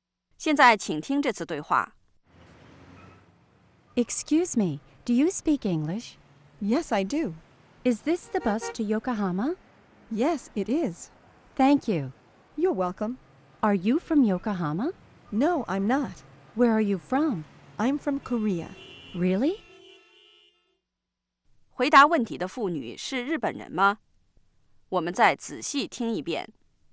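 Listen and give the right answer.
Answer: 不是,她来自韩国。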